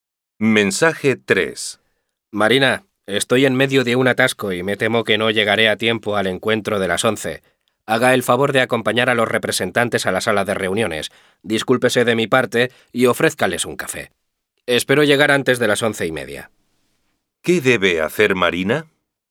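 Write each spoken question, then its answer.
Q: ¿Qué debe hacer Marina?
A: Acompañar a los representantes a la sala de reuniones y ofrecerles un café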